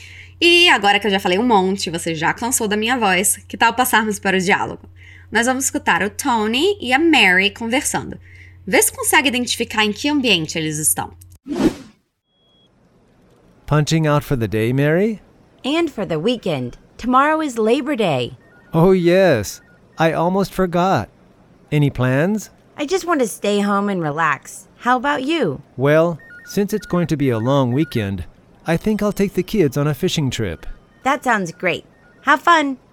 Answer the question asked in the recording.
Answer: Eles estão em um ambiente de trabalho.